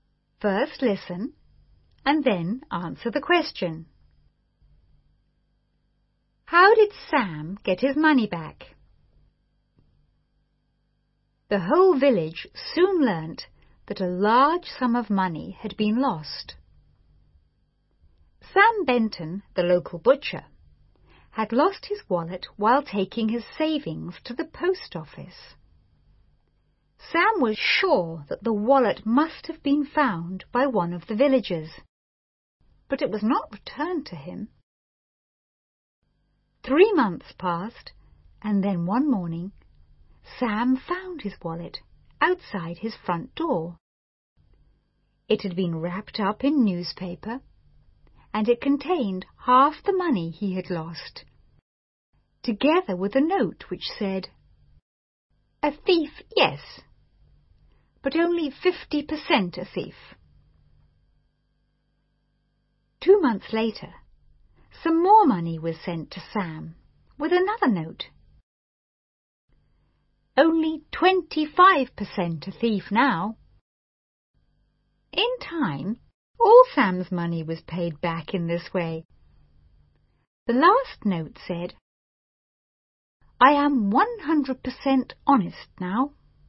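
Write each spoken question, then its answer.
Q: How did Sam get his money back?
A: The thief returned it in instalments, left with notes (half first, then more later, until all was paid back).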